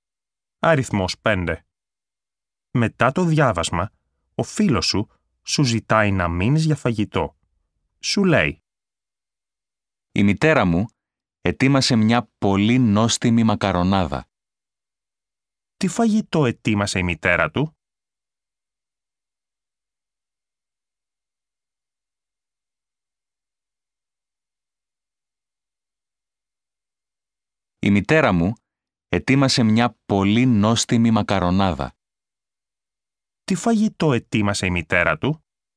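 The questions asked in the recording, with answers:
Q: Τι φαγητό ετοίμασε η μητέρα του?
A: Μακαρονάδα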